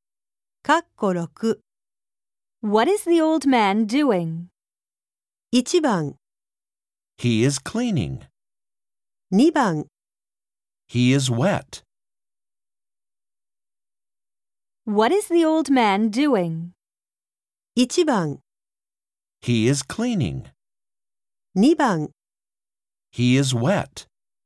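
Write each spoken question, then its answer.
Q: What is the old man doing?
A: 1: He is cleaning.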